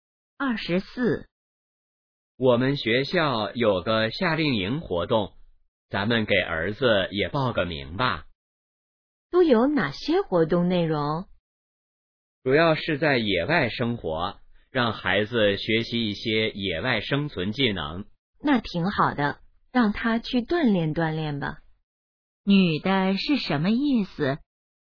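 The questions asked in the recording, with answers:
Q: 女的是什么意思?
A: 同意让儿子参加夏令营锻炼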